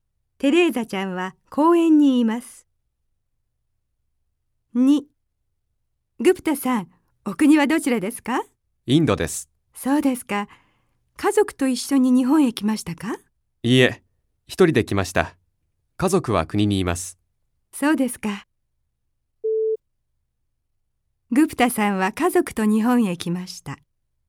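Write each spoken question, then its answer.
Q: グプタさんは家族と日本へ来ました。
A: ×(正しくない。一人で来ました)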